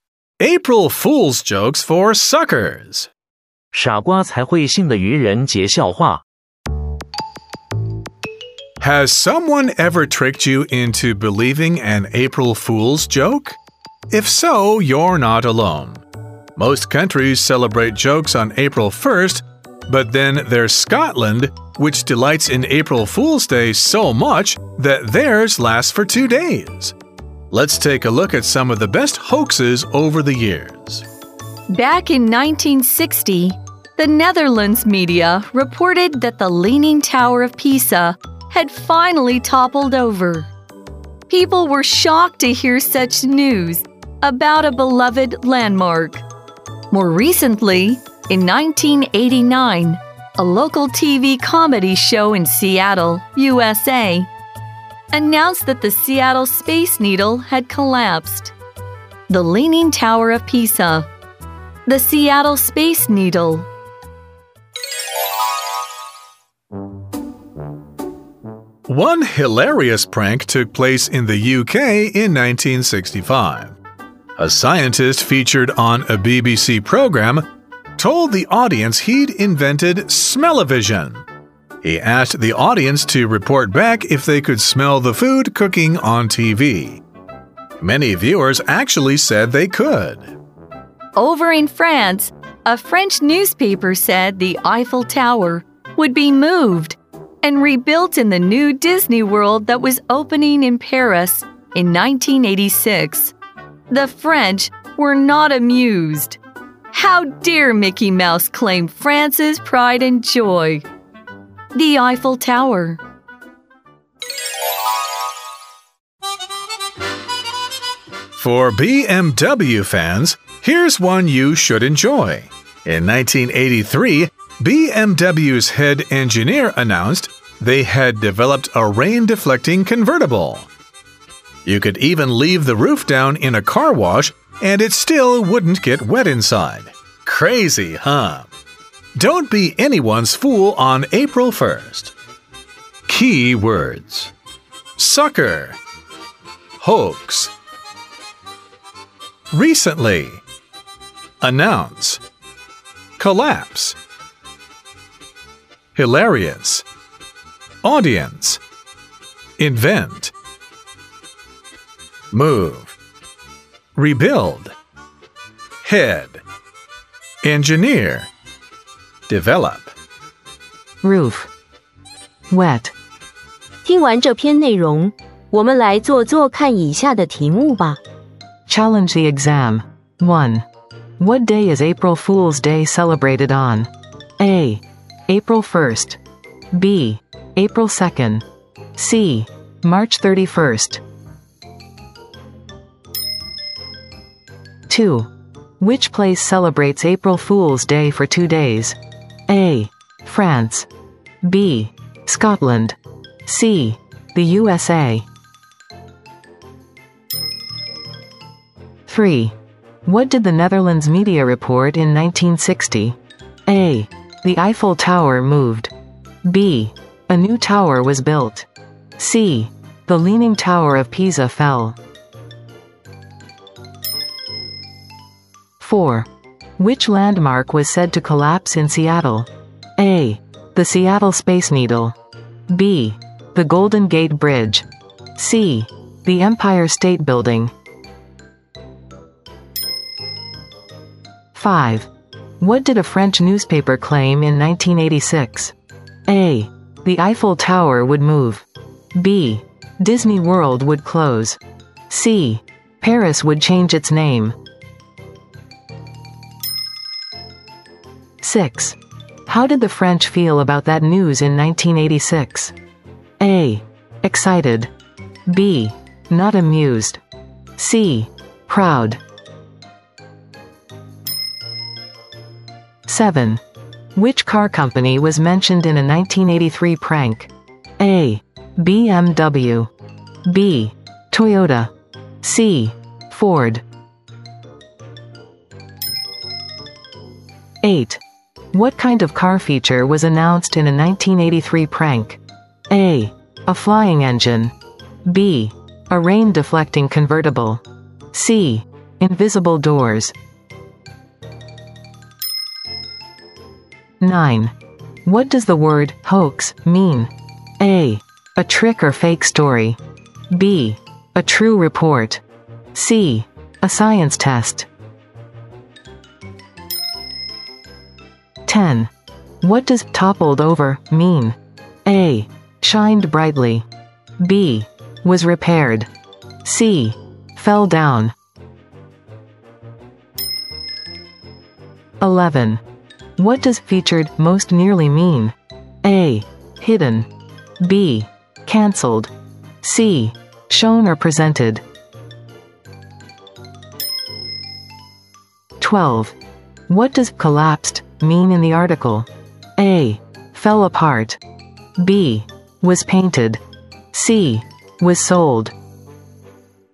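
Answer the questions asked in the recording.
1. A: April 1st.
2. B: Scotland.
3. C: The Leaning Tower of Pisa fell.
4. A: The Seattle Space Needle.
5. A: The Eiffel Tower would move.
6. B: Not amused.
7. A: BMW.
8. B: A rain-deflecting convertible.
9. A: A trick or fake story.
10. C: Fell down.
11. C: Shown or presented.
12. A: Fell apart.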